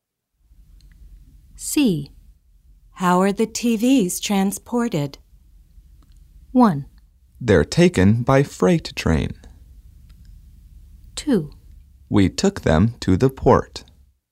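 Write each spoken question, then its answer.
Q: How are the TVs transported?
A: 1: They're taken by freight train.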